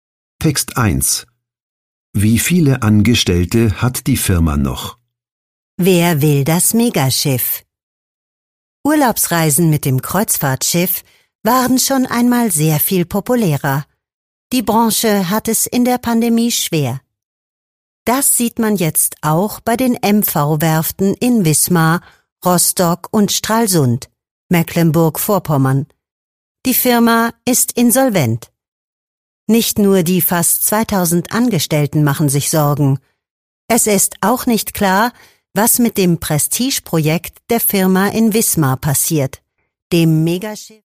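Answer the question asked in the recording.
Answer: fast 2000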